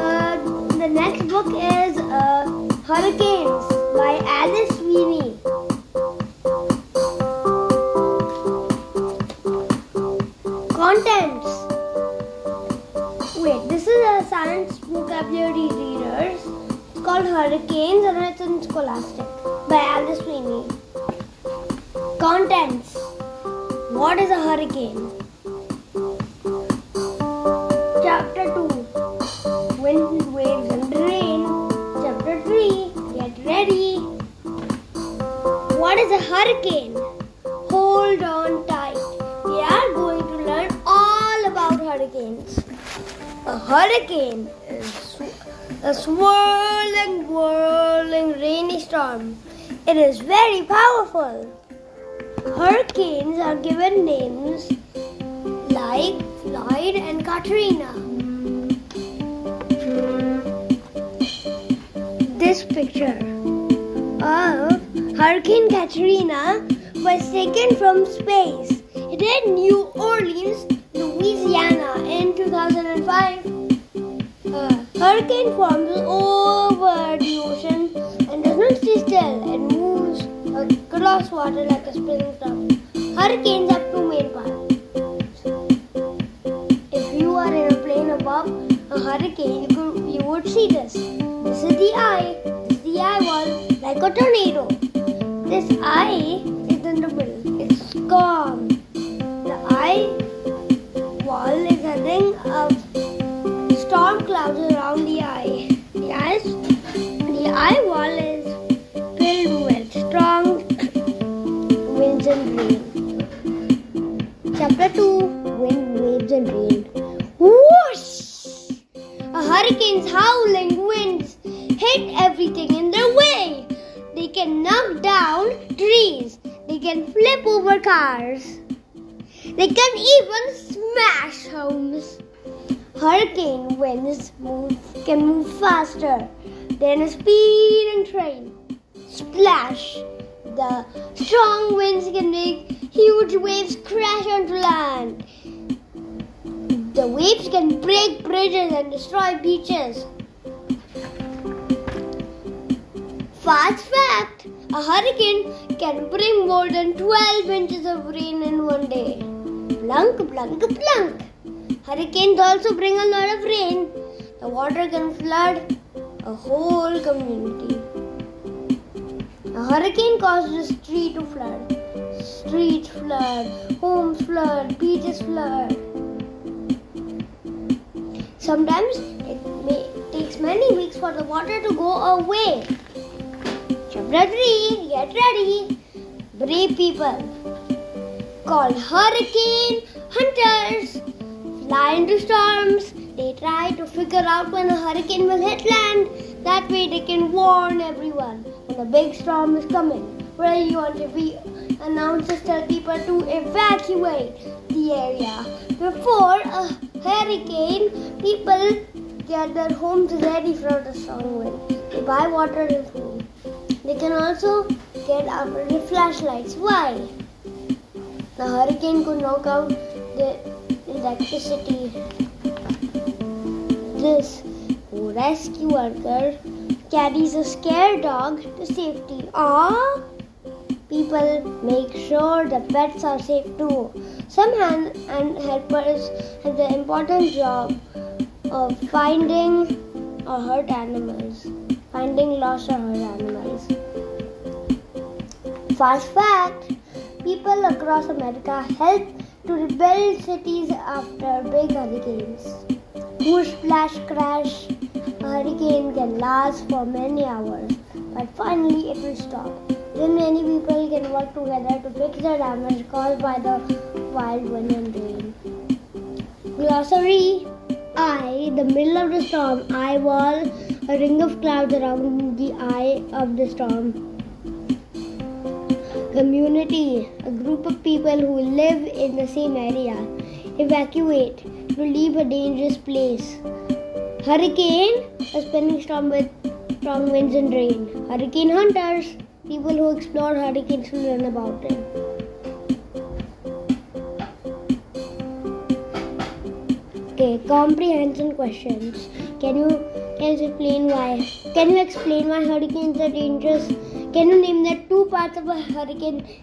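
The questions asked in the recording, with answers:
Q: Can you explain why hurricanes are dangerous?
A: Their strong winds knock down trees, flip cars and smash homes, huge waves break bridges, and heavy rain floods communities

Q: Can you name the two parts of a hurricane?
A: The eye and the eyewall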